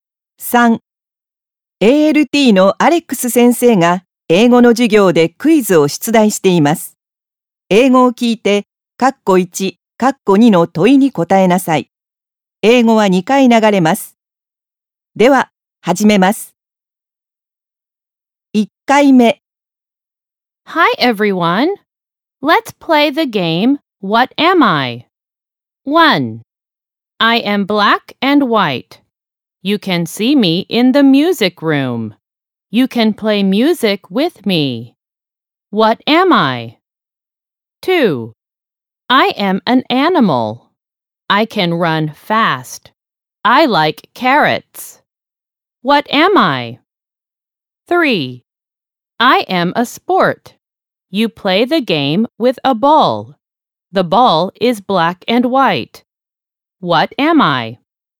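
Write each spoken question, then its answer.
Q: What am I?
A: a piano

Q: What am I?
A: soccer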